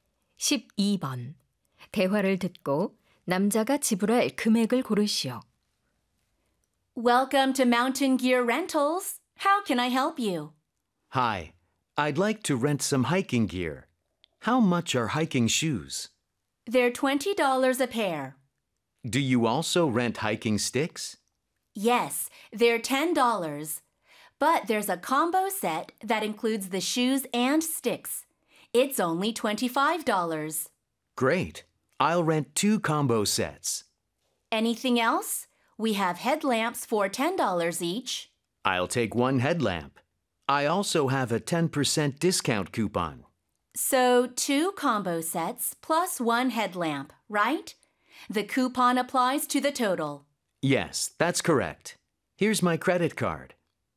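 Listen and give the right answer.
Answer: $54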